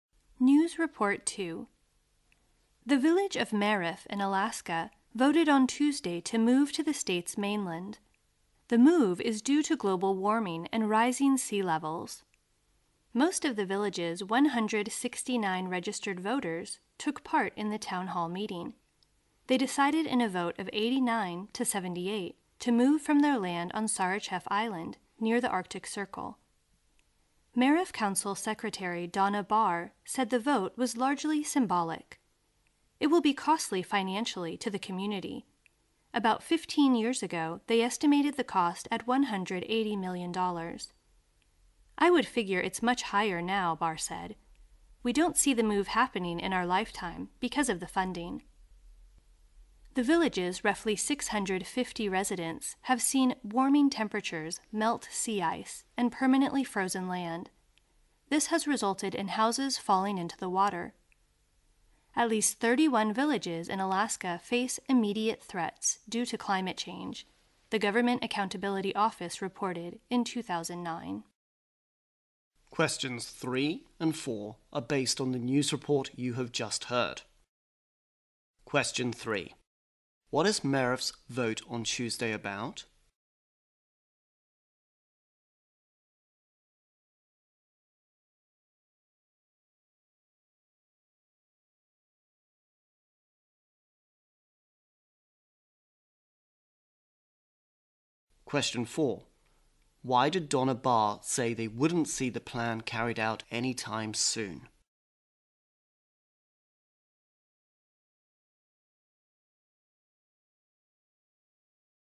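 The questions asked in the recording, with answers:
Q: What is Merif's vote on Tuesday about?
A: Moving the village to the mainland

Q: Why did Donna Barr say they wouldn't see the plan carried out anytime soon?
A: Because of the funding; the move is very costly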